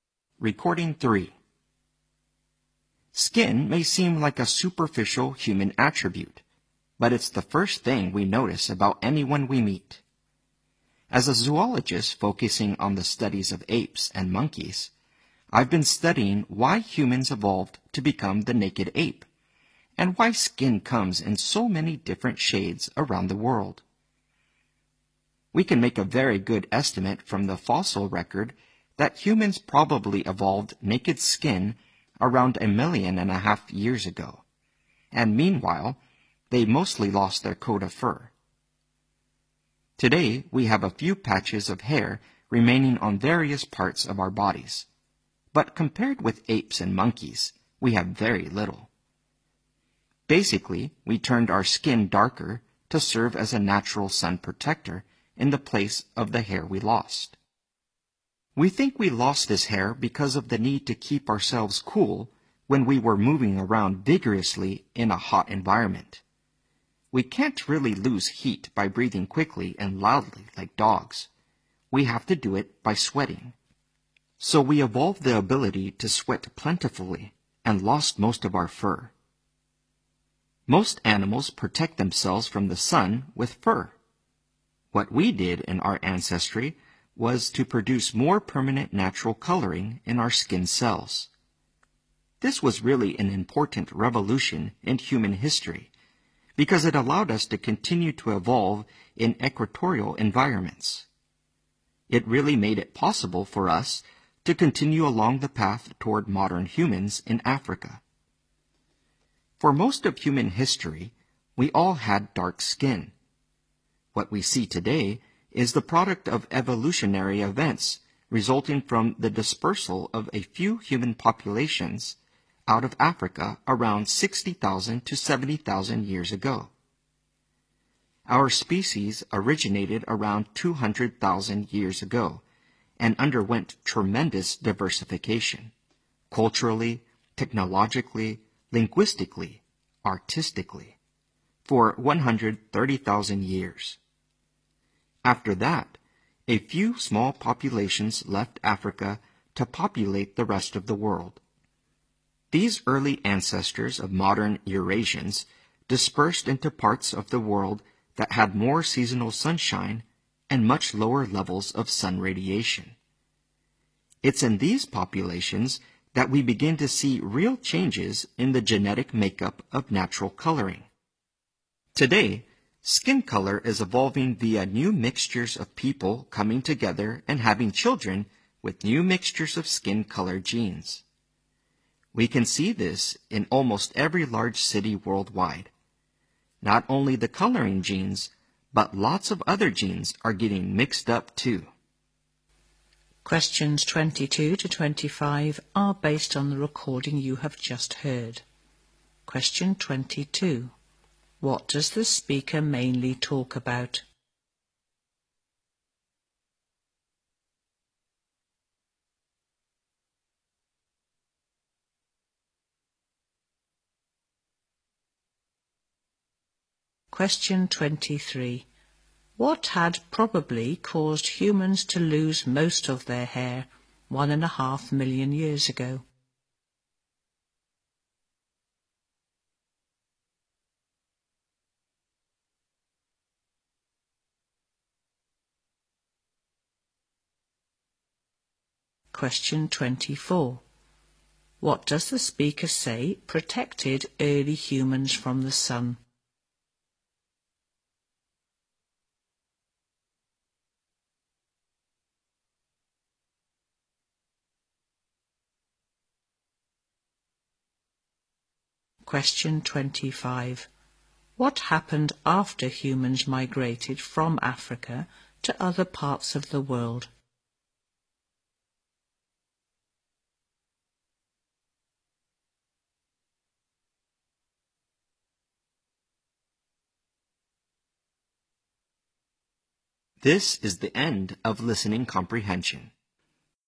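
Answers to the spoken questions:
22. The evolution of human skin and its color
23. The need to keep cool while moving vigorously in a hot environment
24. Darker skin coloring
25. Their skin coloring genes began to change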